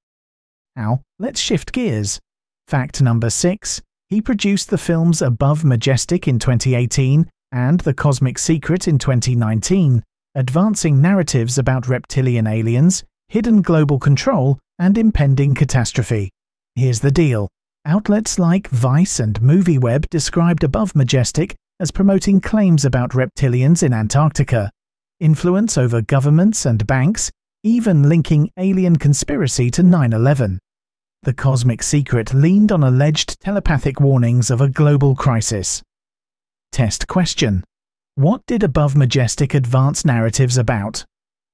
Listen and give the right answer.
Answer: Correct answer, reptilian aliens and global control.